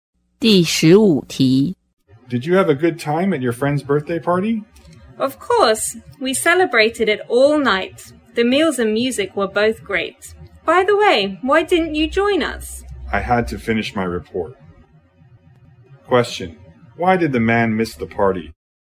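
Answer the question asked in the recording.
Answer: He had to finish his report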